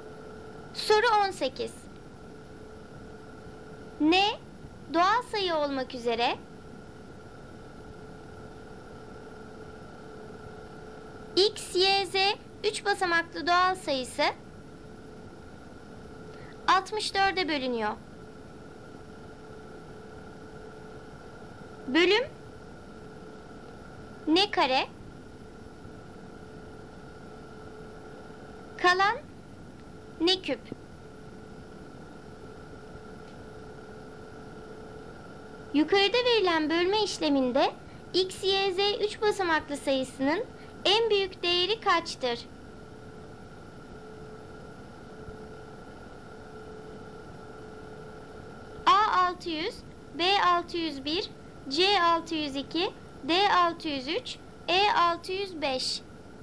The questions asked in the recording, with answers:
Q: Yukarıda verilen bölme işleminde X, Y, Z 3 basamaklı sayısının en büyük değeri kaçtır?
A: Doğru cevap D 603.